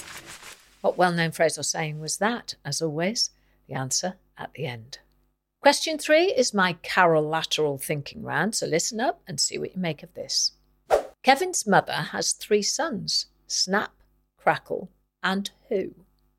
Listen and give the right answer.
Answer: So the answer is Kevin.